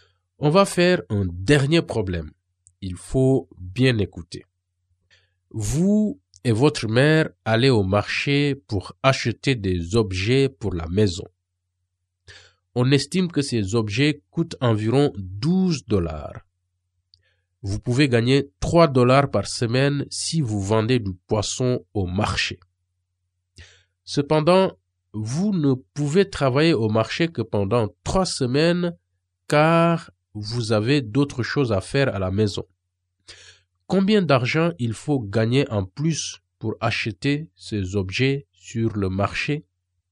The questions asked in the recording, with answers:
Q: Combien d'argent il faut gagner en plus pour acheter ces objets sur le marché?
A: Donc, ma réponse est qu'il me manque 3 $.